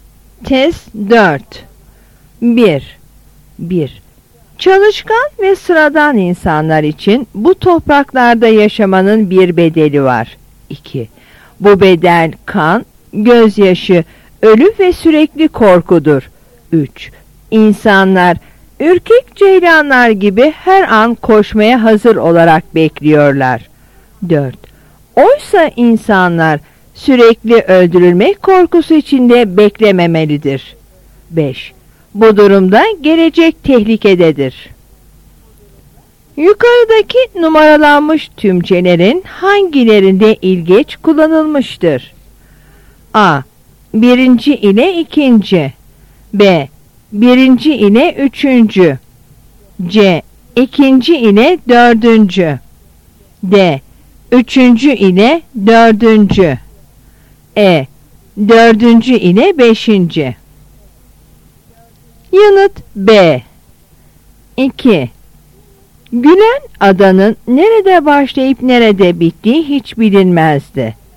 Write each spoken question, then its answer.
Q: Yukarıdaki numaralanmış tümcelerin hangilerinde ilgeç kullanılmıştır?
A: Yanıt B.